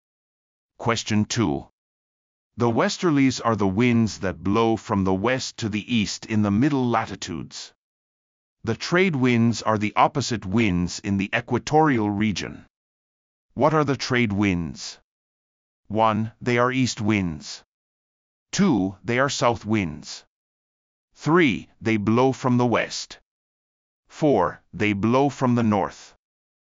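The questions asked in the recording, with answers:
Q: What are the trade winds?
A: 1: They are east winds.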